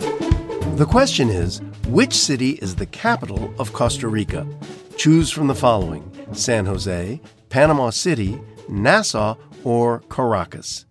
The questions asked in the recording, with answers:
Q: The question is, which city is the capital of Costa Rica?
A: It's San Jose.